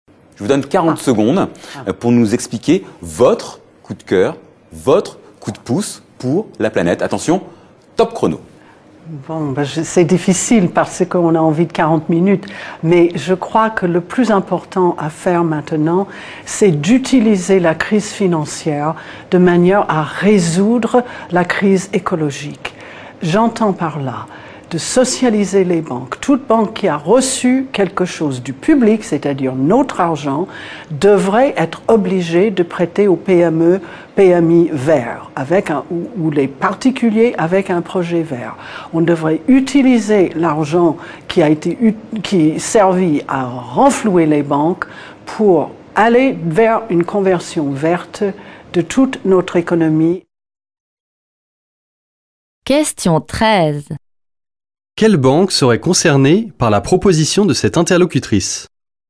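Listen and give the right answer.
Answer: Toute banque ayant reçu de l'argent public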